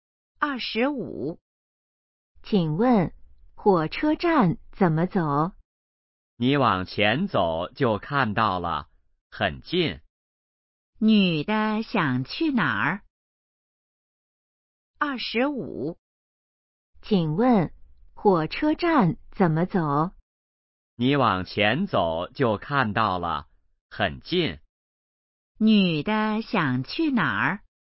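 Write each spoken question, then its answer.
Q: 女的想去哪儿?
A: 火车站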